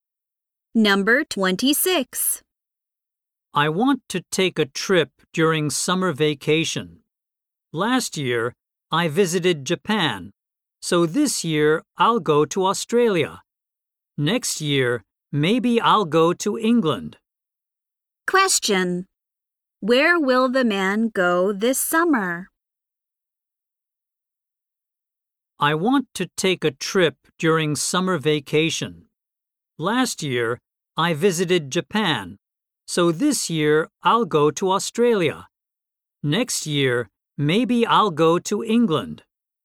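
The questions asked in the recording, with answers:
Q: Where will the man go this summer?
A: Australia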